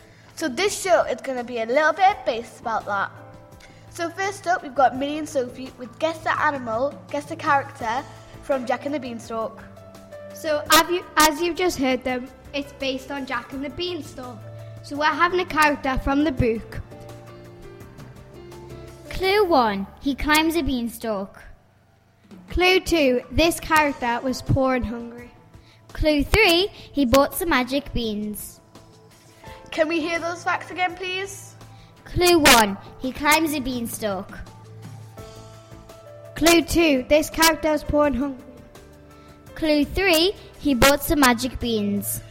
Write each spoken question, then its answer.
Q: Guess the Character from Jack and the Beanstalk.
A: You got it right, it was Jack.